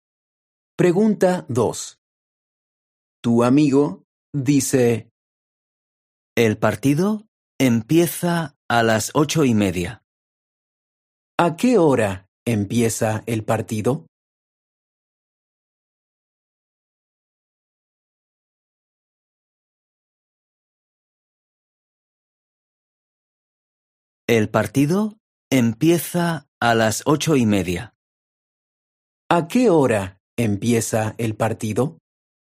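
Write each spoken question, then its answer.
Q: ¿A qué hora empieza el partido?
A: A las 8:30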